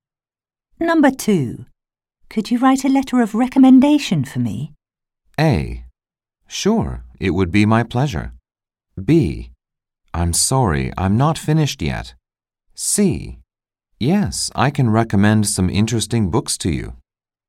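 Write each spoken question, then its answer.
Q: Could you write a letter of recommendation for me?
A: A: Sure, it would be my pleasure.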